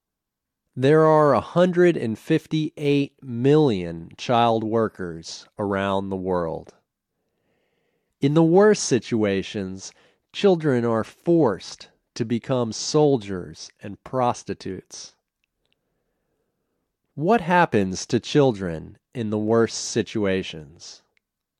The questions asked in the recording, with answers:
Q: What happens to children in the worst situations?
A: They are forced to become soldiers and prostitutes.